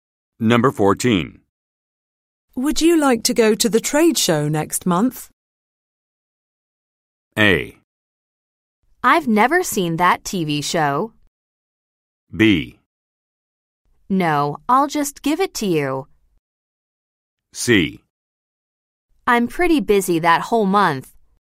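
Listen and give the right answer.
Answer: C: I'm pretty busy that whole month.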